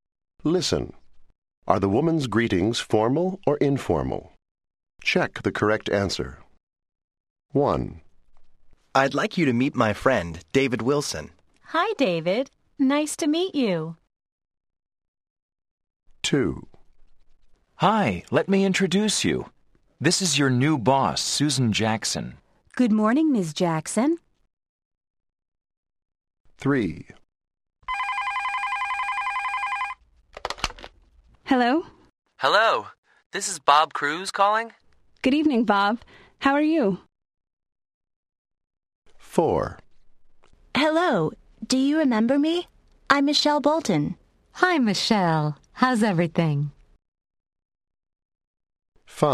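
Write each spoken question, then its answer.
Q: Are the woman's greetings formal or informal?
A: informal

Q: Are the woman's greetings formal or informal?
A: formal

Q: Are the woman's greetings formal or informal?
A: informal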